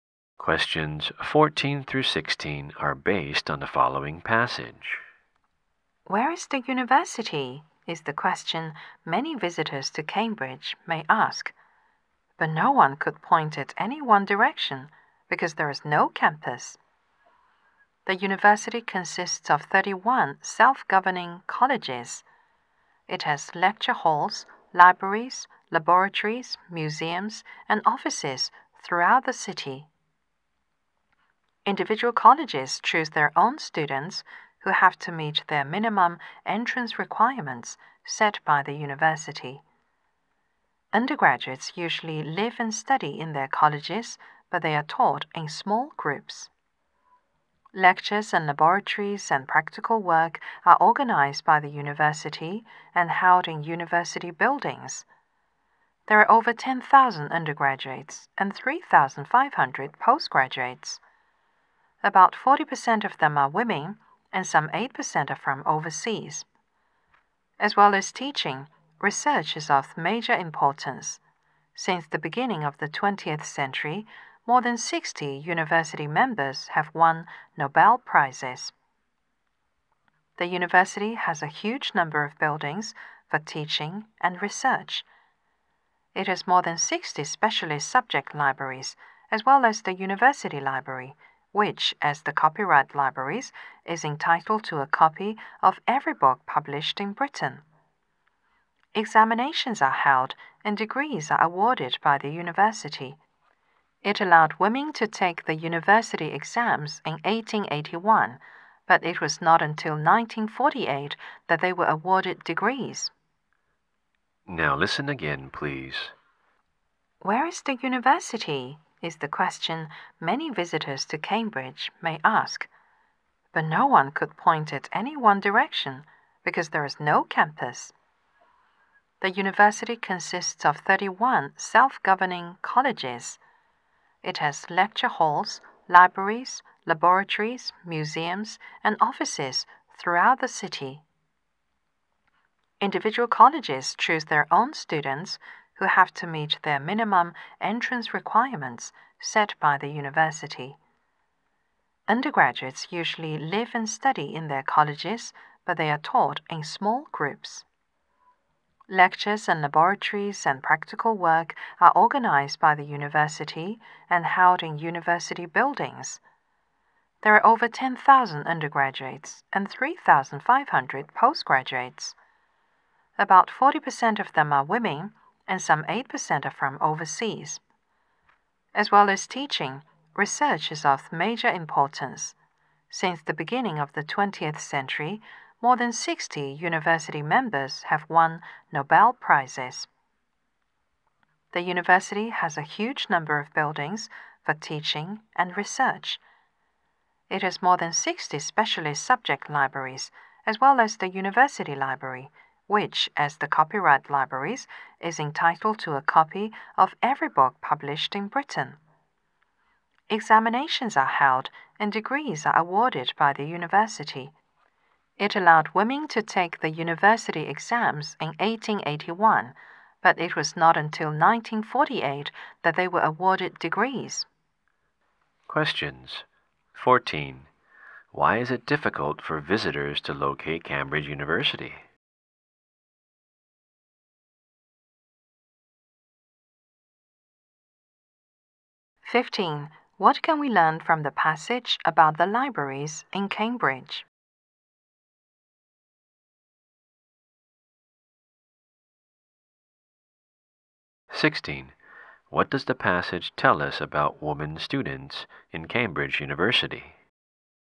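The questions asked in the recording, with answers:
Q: Why is it difficult for visitors to locate Cambridge University?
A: It has no campus; its colleges and buildings are spread throughout the city

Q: What can we learn from the passage about the libraries in Cambridge?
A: The university library is entitled to a copy of every book published in Britain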